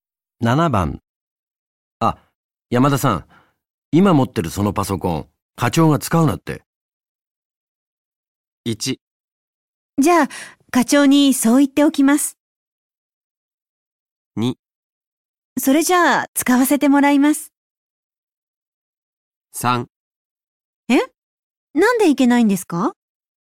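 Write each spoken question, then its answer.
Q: あ、山田さん、今持ってるそのパソコン、課長が使うなって。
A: 3: え、なんでいけないんですか?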